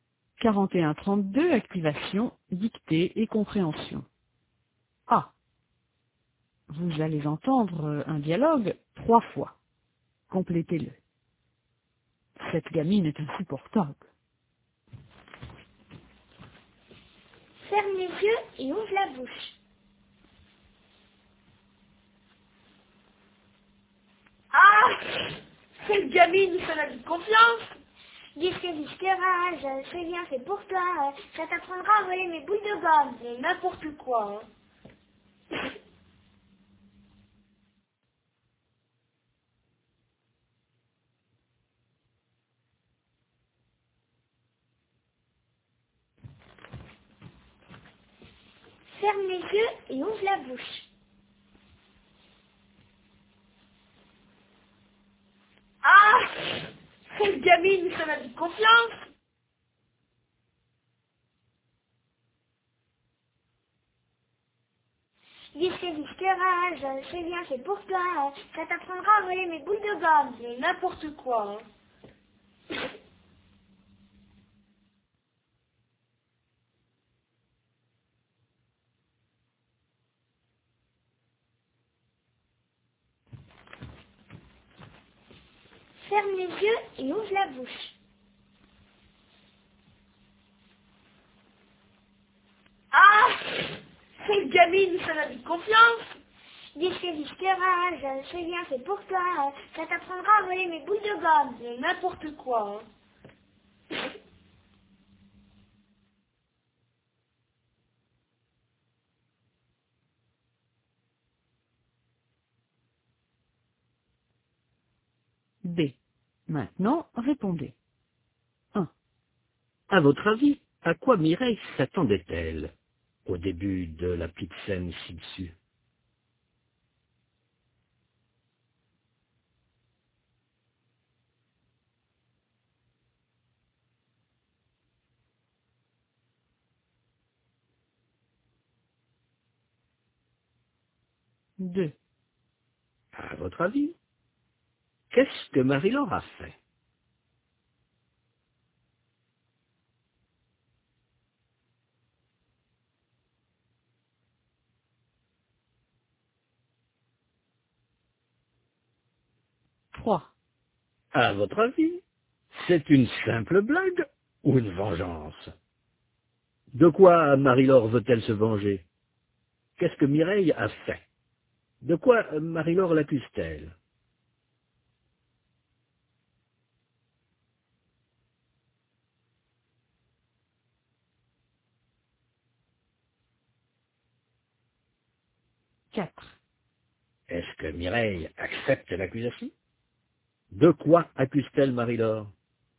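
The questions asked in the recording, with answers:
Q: De quoi Marie-Laure l'accuse-t-elle?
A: D'avoir volé ses boules de gomme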